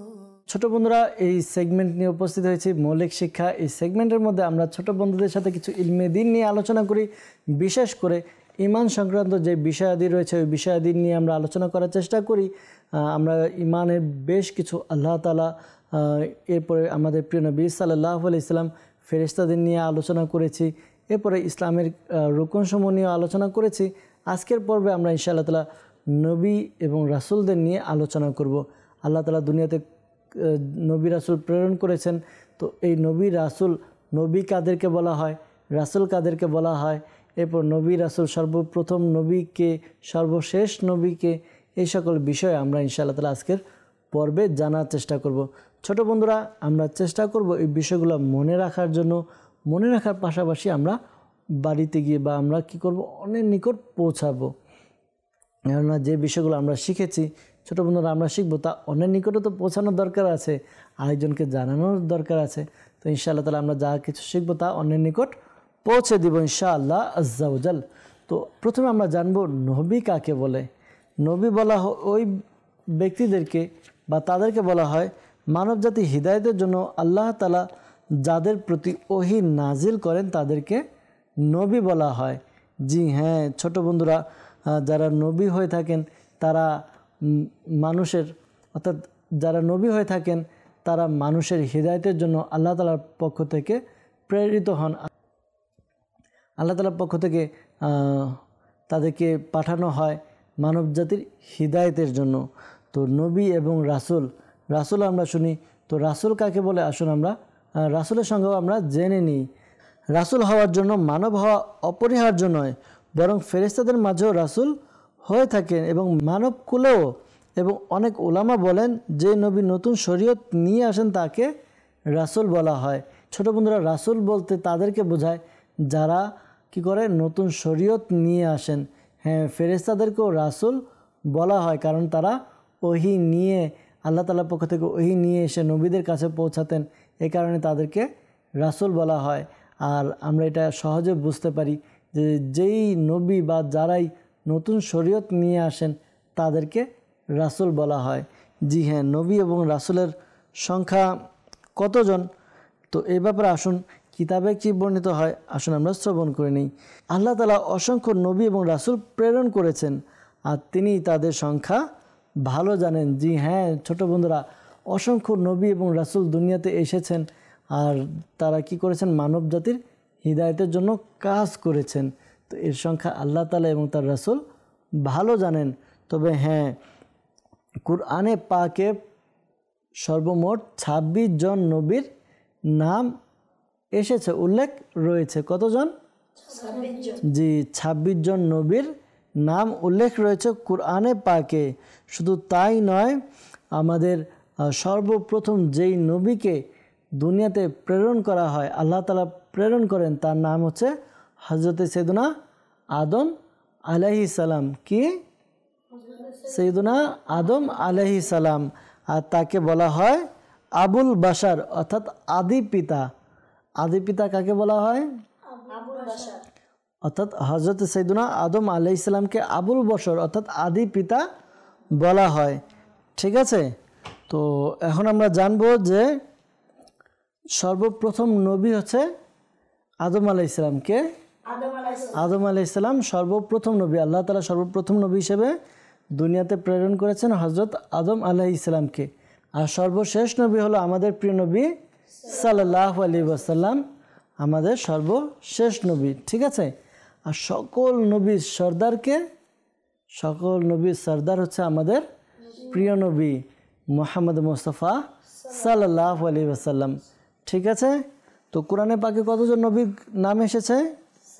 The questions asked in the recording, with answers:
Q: তো কুরআনে পাকে কতজন নবী নাম এসেছে?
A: 26 জন।